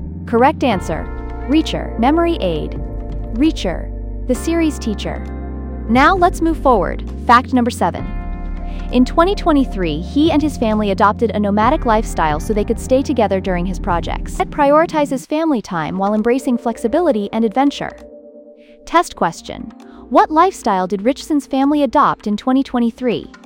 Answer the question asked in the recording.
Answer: nomadic.